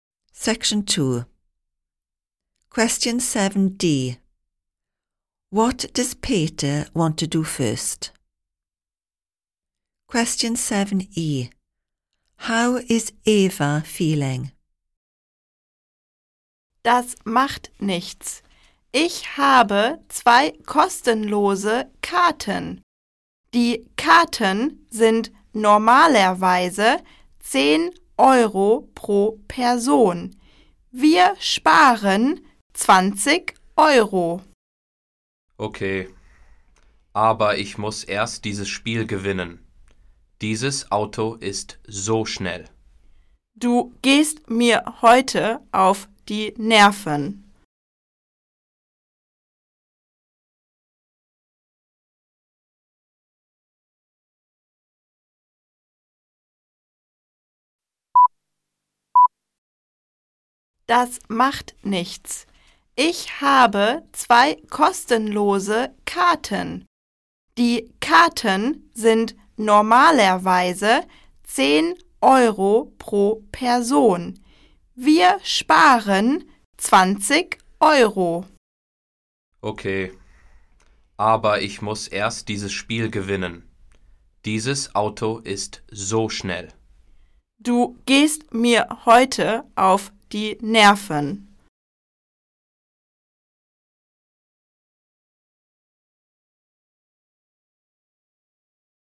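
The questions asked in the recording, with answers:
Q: What does Peter want to do first?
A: Win the computer game he is playing

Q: How is Eva feeling?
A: Annoyed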